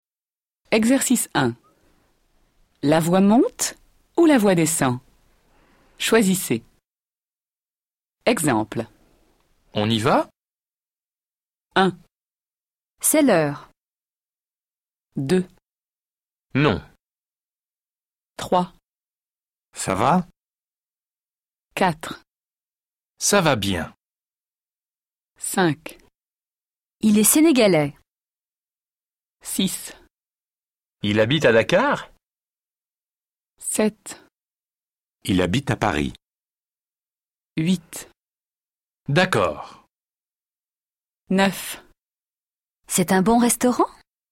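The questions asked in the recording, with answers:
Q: Ça va?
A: la voix monte

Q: Il habite à Dakar?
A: la voix monte

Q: C'est un bon restaurant?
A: la voix monte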